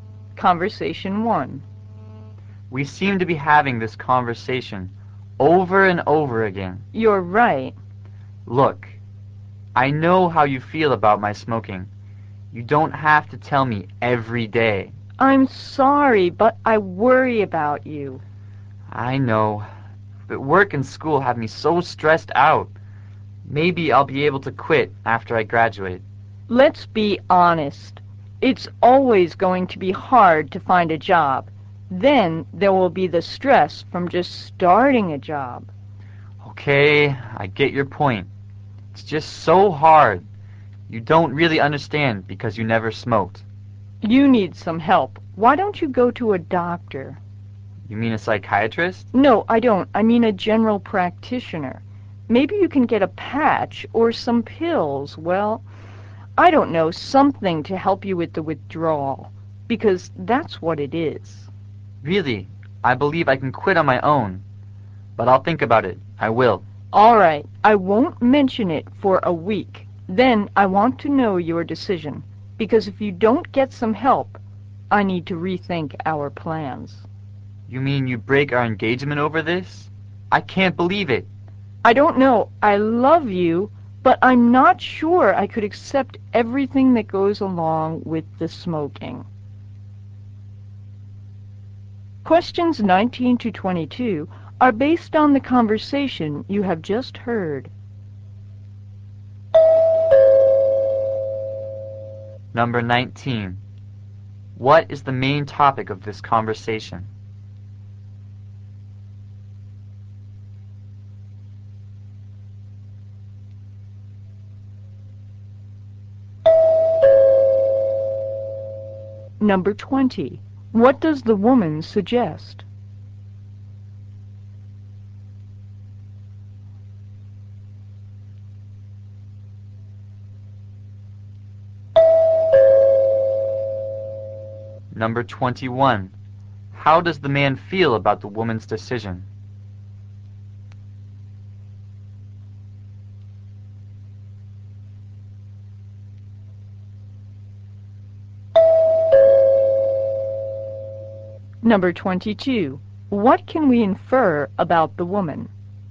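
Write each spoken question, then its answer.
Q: What is the main topic of this conversation?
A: The man's smoking.

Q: What does the woman suggest?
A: That he see a doctor (a general practitioner) for help quitting.

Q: How does the man feel about the woman's decision?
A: Shocked; he can't believe it.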